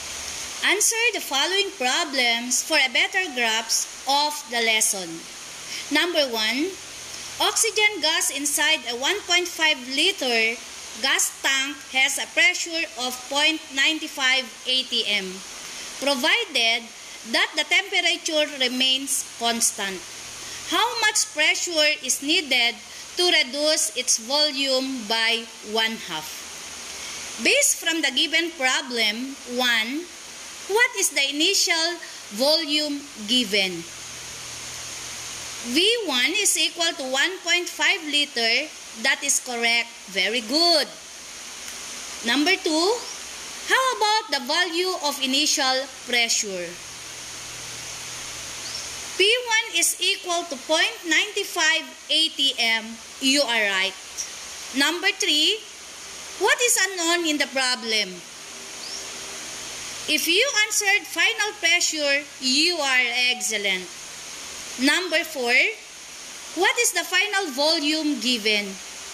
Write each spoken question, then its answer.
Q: What is the initial volume given?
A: V1 is equal to 1.5 liter.

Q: How about the value of initial pressure?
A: P1 is equal to 0.95 atm.

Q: What is the final volume given?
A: The value of final volume is 0.75 liter.